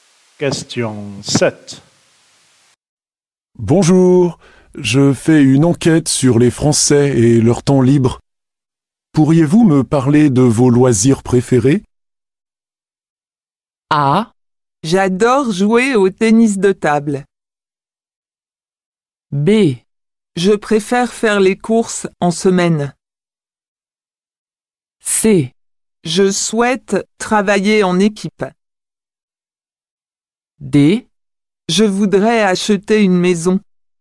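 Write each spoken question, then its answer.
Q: Pourriez-vous me parler de vos loisirs préférés?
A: A: J'adore jouer au tennis de table.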